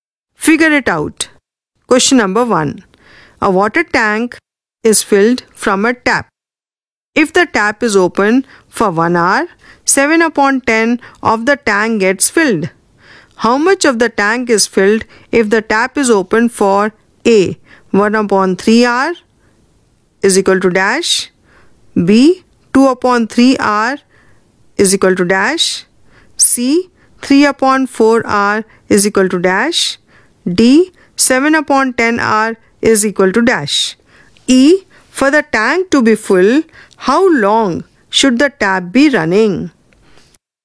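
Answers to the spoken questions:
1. 7/30 of the tank
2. 7/15 of the tank
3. 21/40 of the tank
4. 49/100 of the tank
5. 10/7 hours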